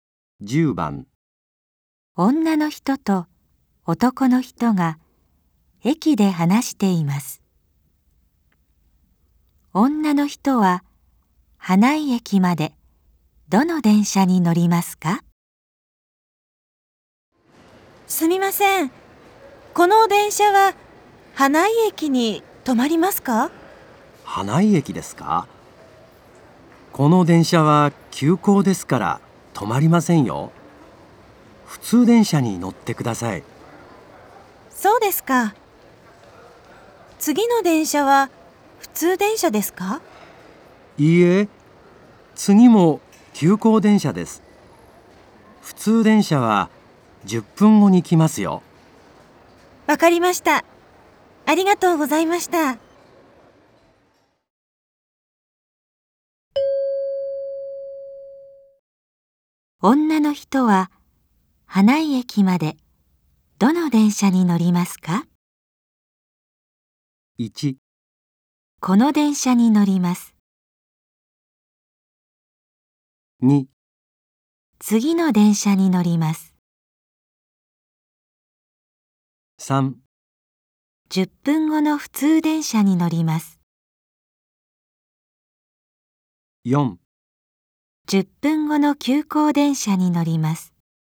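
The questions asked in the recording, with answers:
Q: 女の人は花井駅までどの電車に乗りますか?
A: 3: 10分後の普通電車に乗ります。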